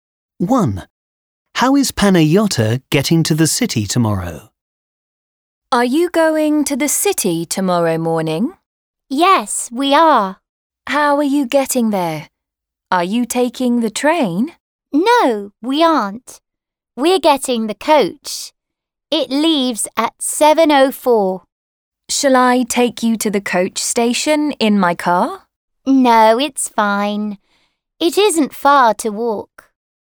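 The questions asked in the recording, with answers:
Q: How is Panayota getting to the city tomorrow?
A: By coach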